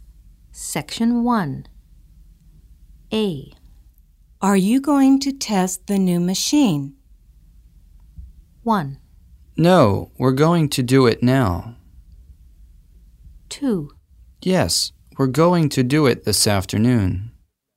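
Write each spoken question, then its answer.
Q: Are you going to test the new machine?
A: 2: Yes, we're going to do it this afternoon.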